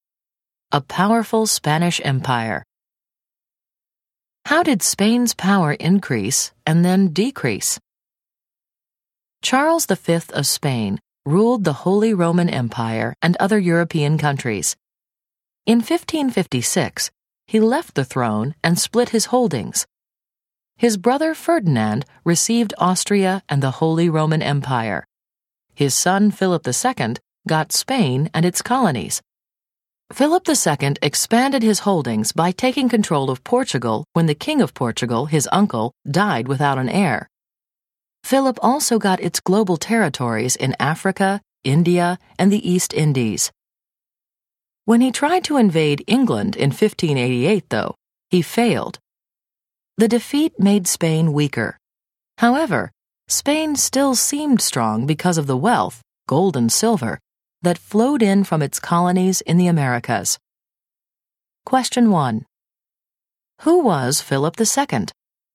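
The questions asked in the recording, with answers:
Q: Who was Philip II?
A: Son of Charles V who ruled Spain, its colonies and Portugal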